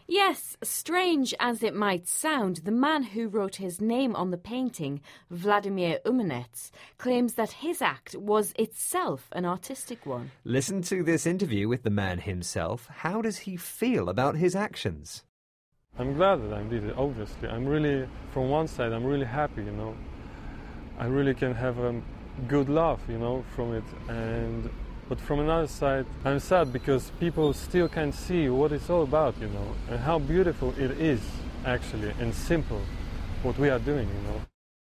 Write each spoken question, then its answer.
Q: How does he feel about his actions?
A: Yes, he says that he's happy because you can have a laugh.